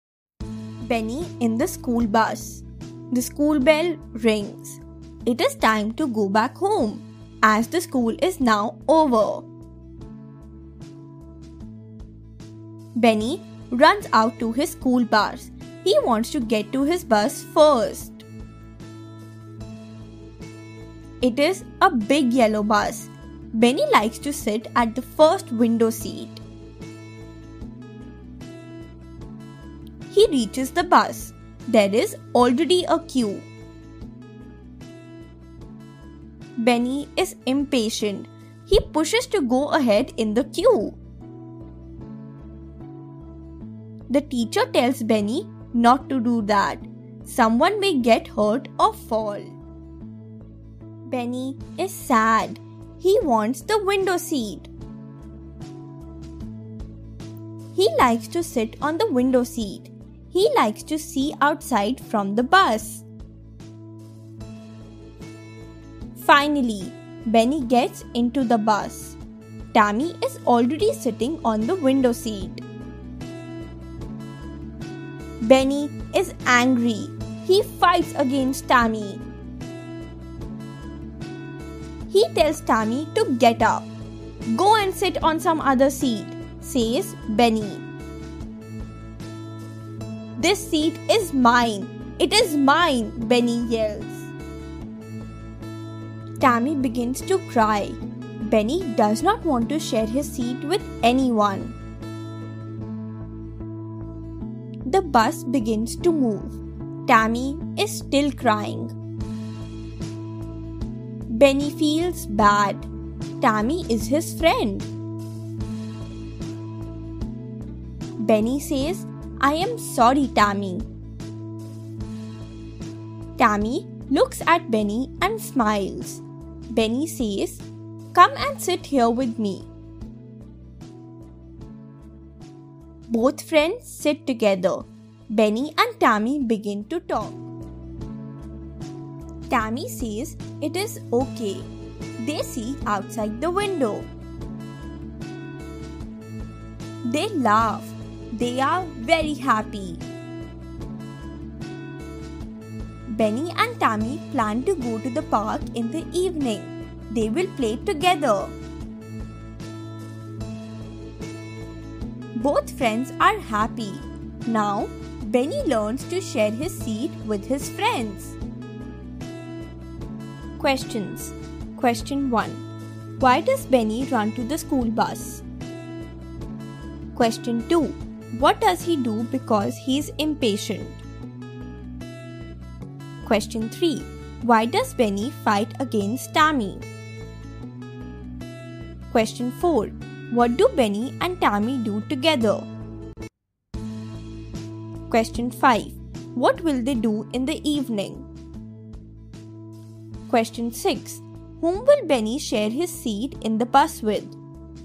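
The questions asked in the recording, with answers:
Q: Why does Benny run to the school bus?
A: He wants to get to his bus first and sit at the window seat.

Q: What does he do because he is impatient?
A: He pushes to go ahead in the queue.

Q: Why does Benny fight against Tammy?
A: Tammy is sitting on the window seat he wants.

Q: What do Benny and Tammy do together?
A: They sit together, talk, look outside the window and laugh.

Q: What will they do in the evening?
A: Go to the park and play together.

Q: Whom will Benny share his seat in the bus with?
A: His friends.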